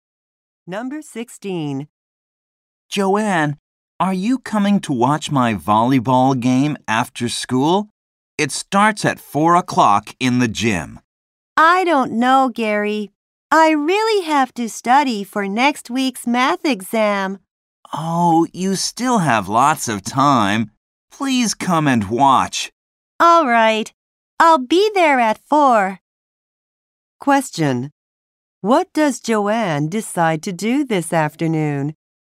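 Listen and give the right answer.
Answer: Watch Gary's volleyball game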